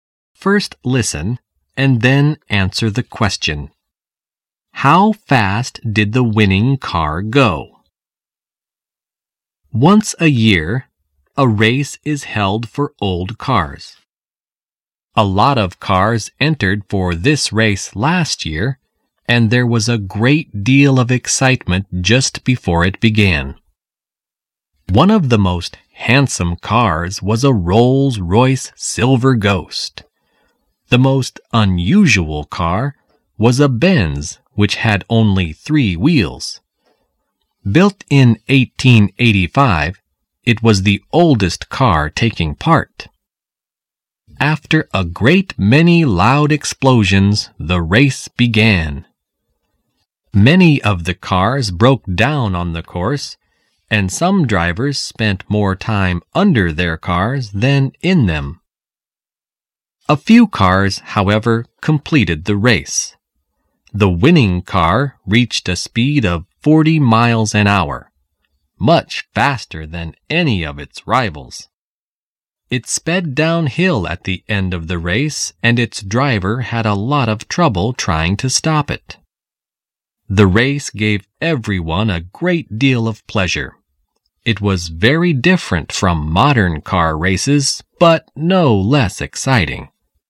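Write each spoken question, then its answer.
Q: How fast did the winning car go?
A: 40 miles an hour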